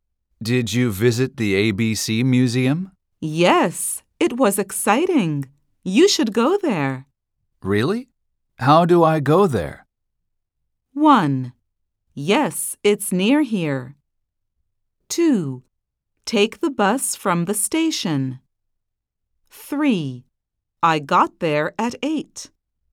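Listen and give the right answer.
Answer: 2: Take the bus from the station.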